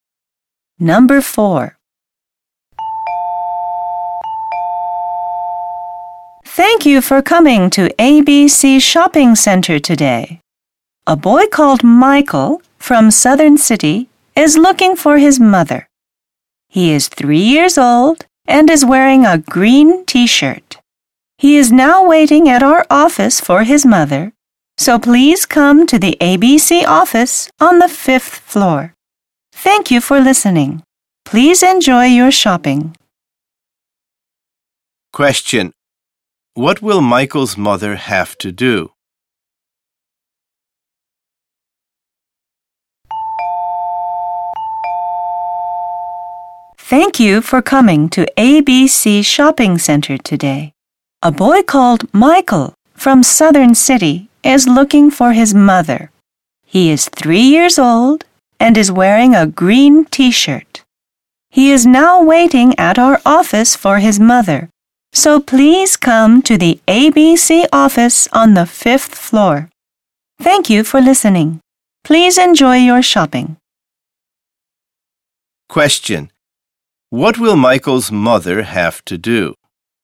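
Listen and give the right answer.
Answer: Go to the ABC office on the 5th floor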